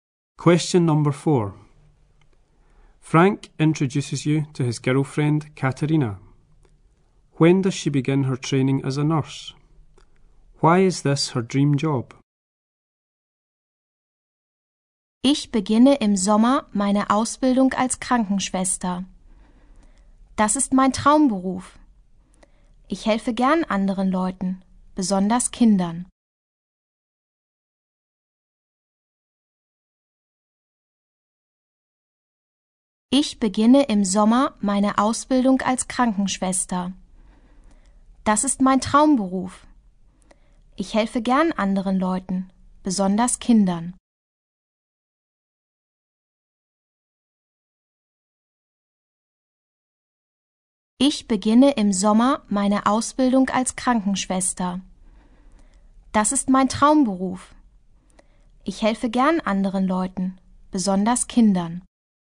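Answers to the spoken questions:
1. In the summer
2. She likes helping other people, especially children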